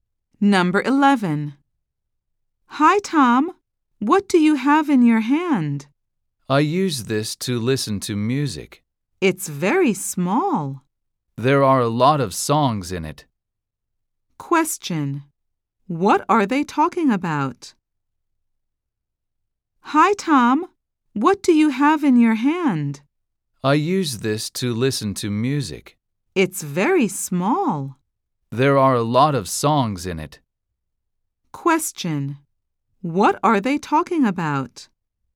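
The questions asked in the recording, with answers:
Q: What are they talking about?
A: A music player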